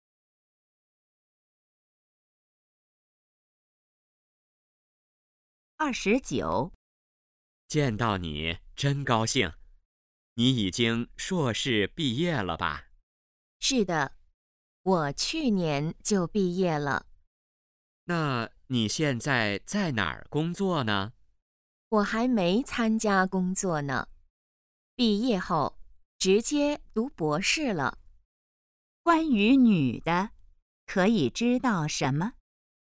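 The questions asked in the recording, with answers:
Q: 关于女的,可以知道什么?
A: 在读博士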